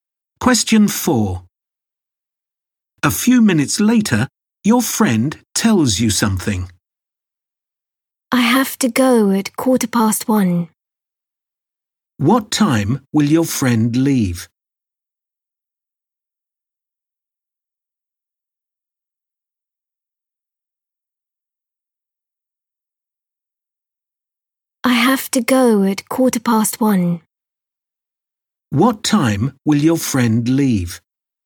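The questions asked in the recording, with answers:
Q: What time will your friend leave?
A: 1:15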